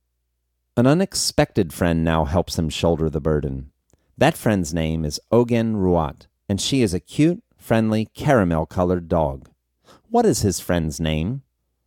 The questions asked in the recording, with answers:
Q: What is his friend's name?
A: His friend's name is Ogen Ruat.